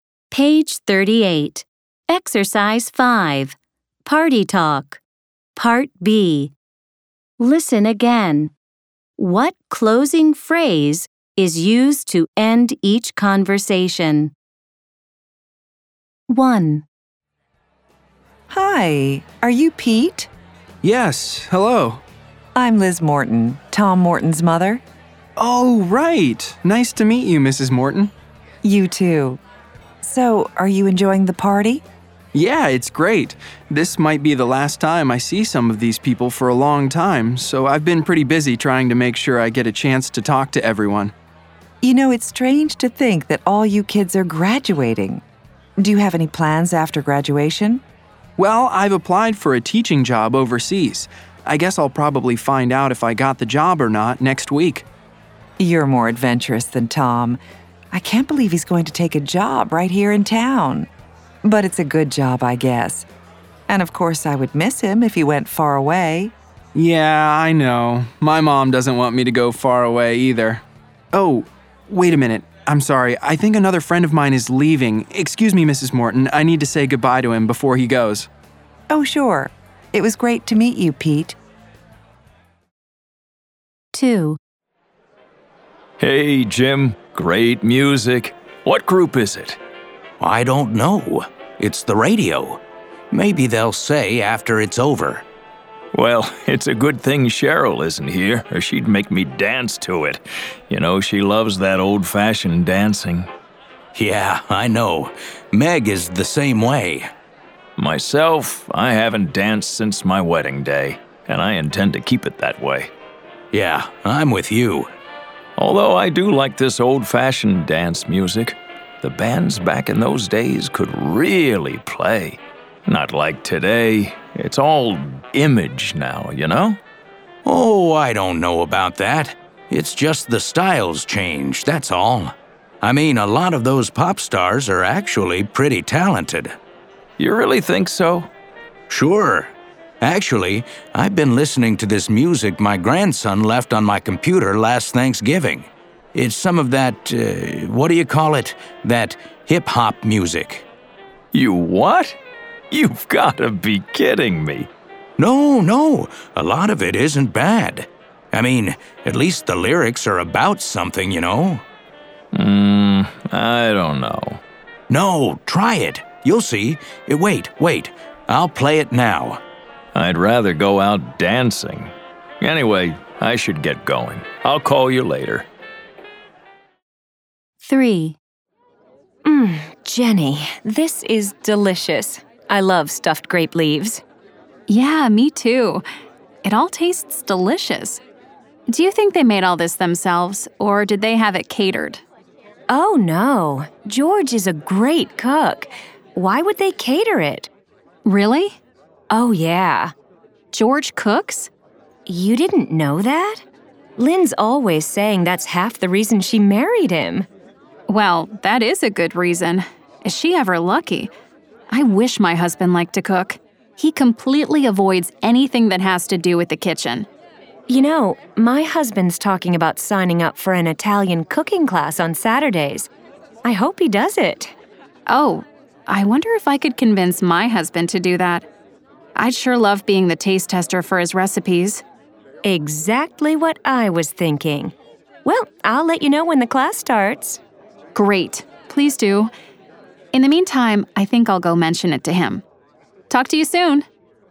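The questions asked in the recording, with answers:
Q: What closing phrase is used to end each conversation?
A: Anyway, I should get going. I'll call you later.

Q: What closing phrase is used to end each conversation?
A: Talk to you soon.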